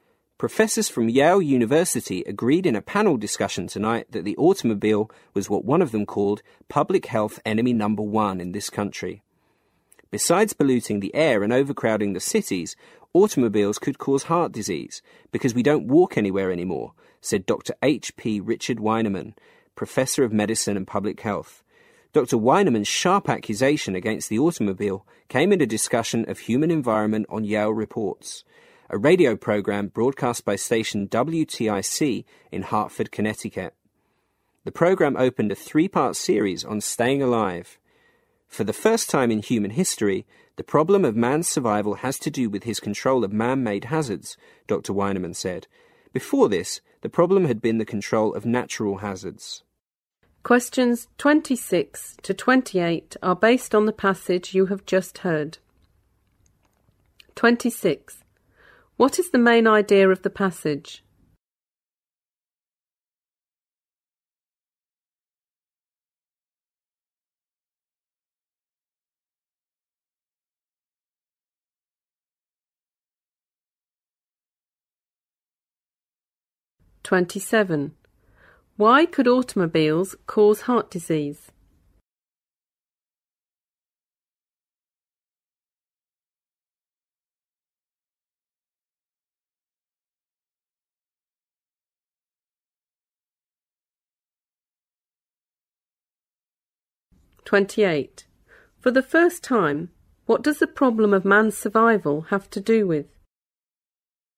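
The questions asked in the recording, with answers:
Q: What is the main idea of the passage?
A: The automobile is public health enemy number one

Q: Why could automobiles cause heart disease?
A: Because people don't walk anywhere anymore

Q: For the first time, what does the problem of man's survival have to do with?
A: His control of man-made hazards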